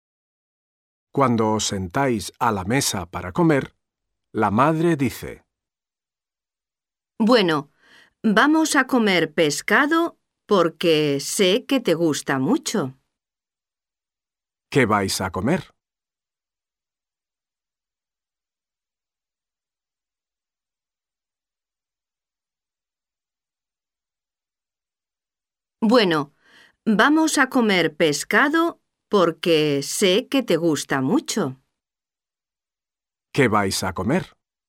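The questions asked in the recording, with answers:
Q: ¿Qué vais a comer?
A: Pescado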